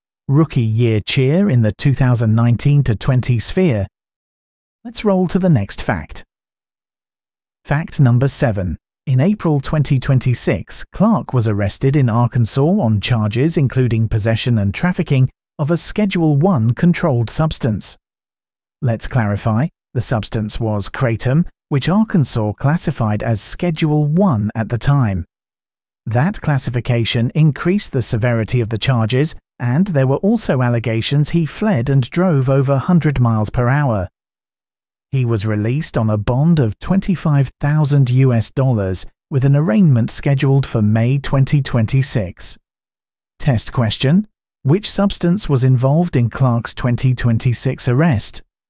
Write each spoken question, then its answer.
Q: which substance was involved in Clark's 2026 arrest?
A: kratom.